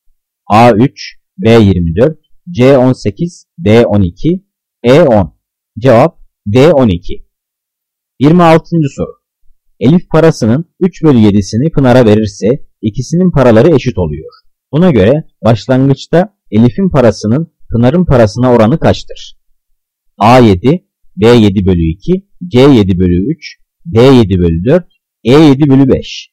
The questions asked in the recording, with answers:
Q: Buna göre başlangıçta Elif'in parasının Pınar'ın parasına oranı kaçtır?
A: Cevap A7.